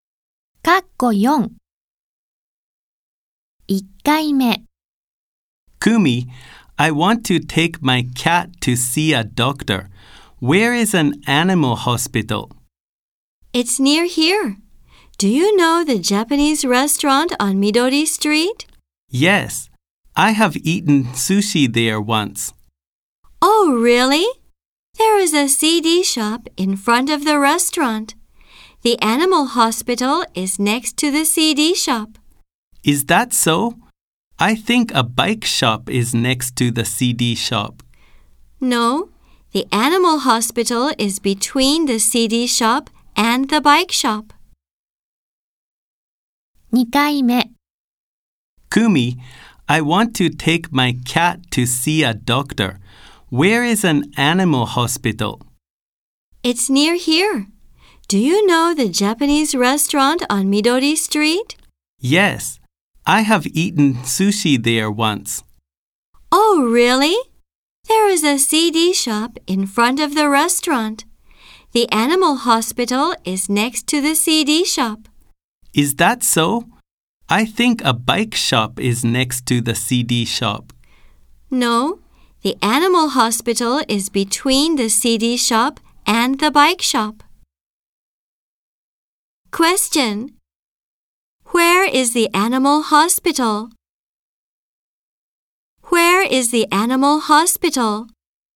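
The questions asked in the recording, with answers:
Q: Where is the animal hospital?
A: Between the CD shop and the bike shop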